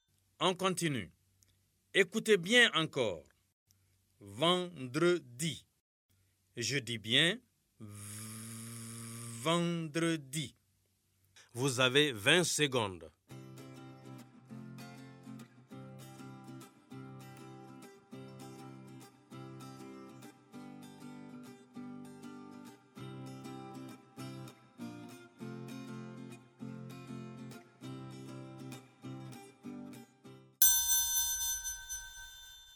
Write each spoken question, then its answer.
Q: vendredi. Vous avez 20 secondes.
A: j'espère que vous avez écrit la lettre V sur les ardoises.